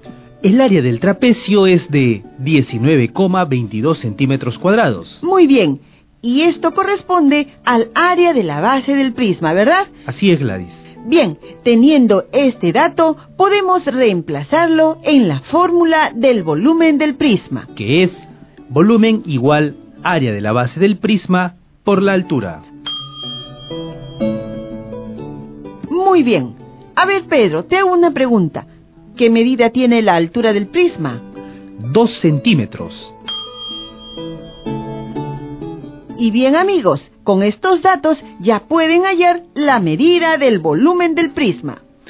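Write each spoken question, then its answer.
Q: Y bien, amigos, con estos datos ya pueden hallar la medida del volumen del prisma.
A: 38,44 centímetros cúbicos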